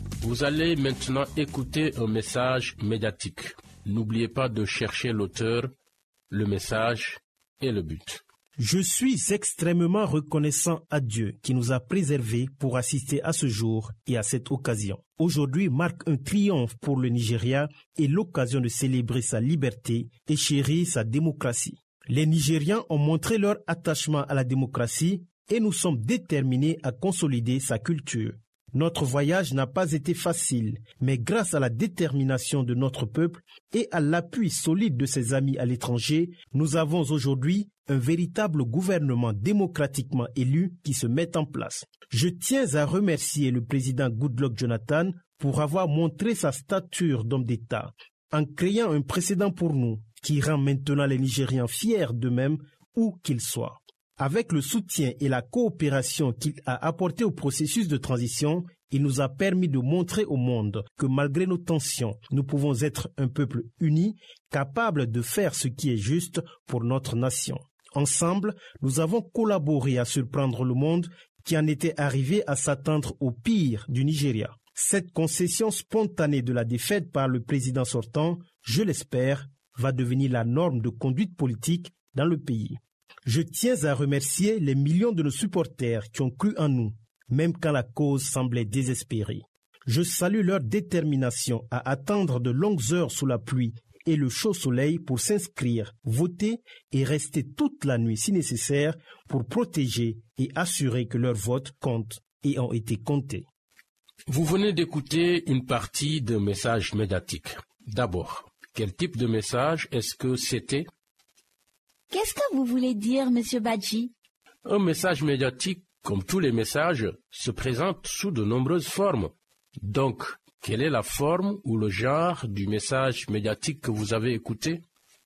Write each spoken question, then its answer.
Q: Donc, quelle est la forme ou le genre du message médiatique que vous avez écouté?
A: Oui, la forme est un type particulier de discours qu'on appelle discours d'investiture.